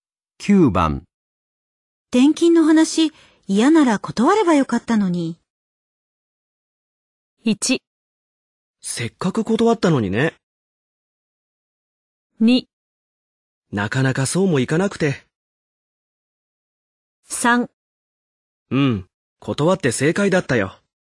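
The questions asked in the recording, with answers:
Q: 転勤の話、嫌なら断ればよかったのに。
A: 2: なかなかそうもいかなくて。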